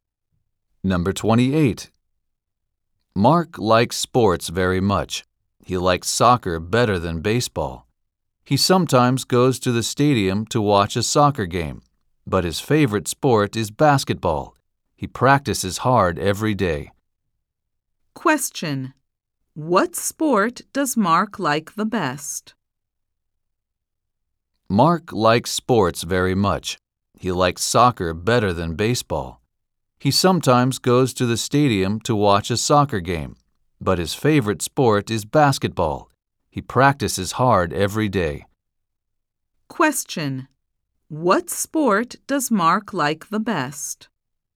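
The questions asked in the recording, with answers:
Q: What sport does Mark like the best?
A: Basketball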